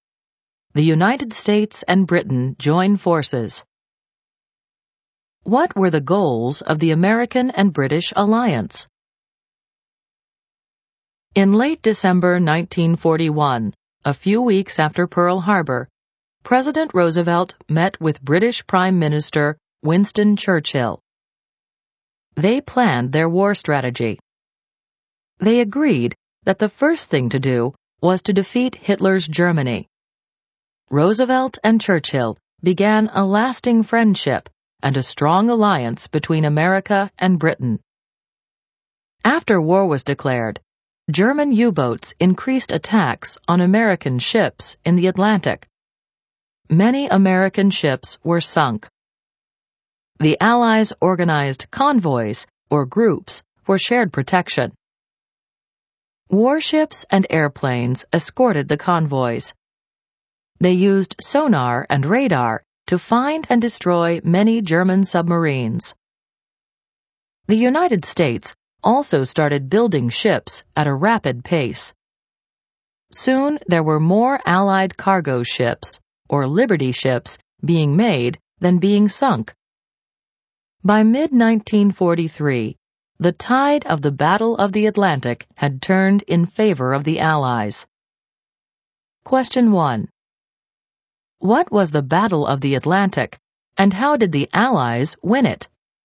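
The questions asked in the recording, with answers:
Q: What was the Battle of the Atlantic, and how did the Allies win it?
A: The fight against German U-boat attacks on Allied ships in the Atlantic; the Allies won by using escorted convoys with sonar and radar to destroy submarines and by building Liberty ships faster than they were sunk.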